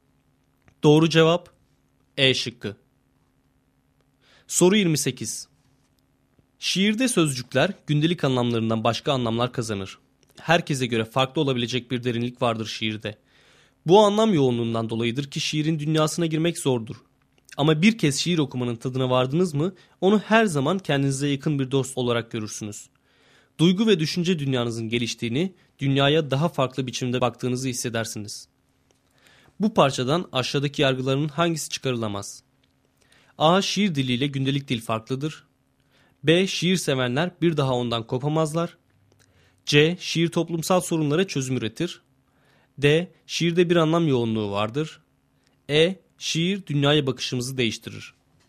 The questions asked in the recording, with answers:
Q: Bu parçadan aşağıdaki yargıların hangisi çıkarılamaz?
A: Doğru cevap C şıkkı.